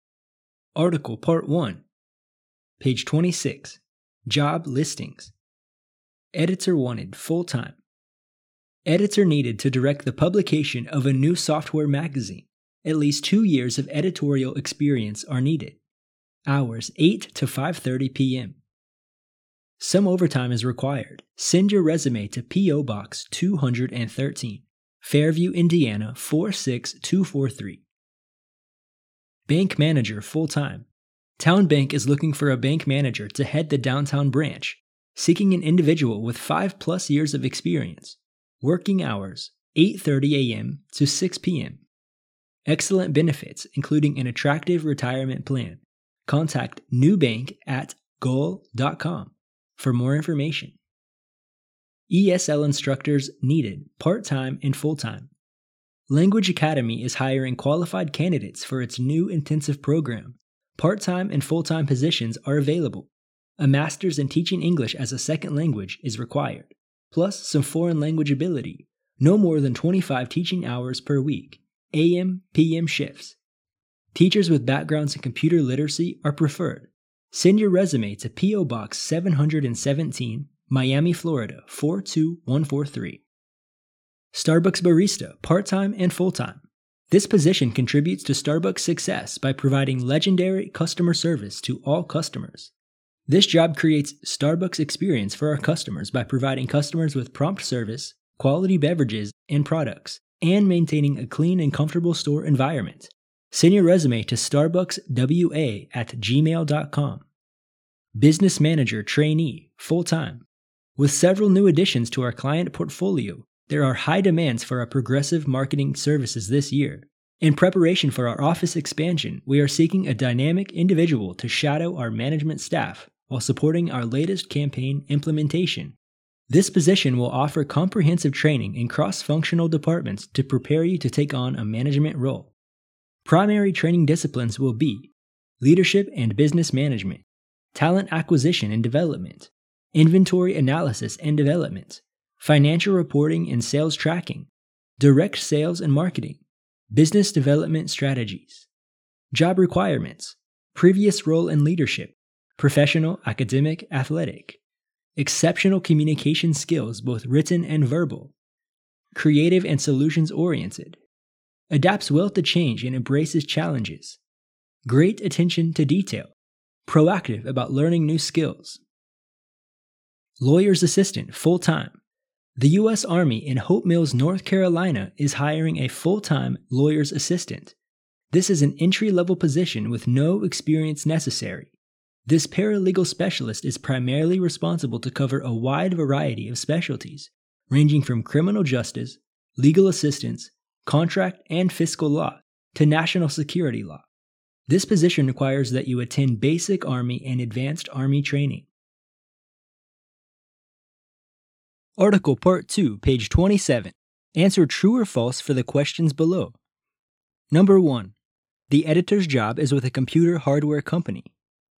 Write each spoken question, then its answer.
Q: The editor's job is with a computer hardware company.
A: False.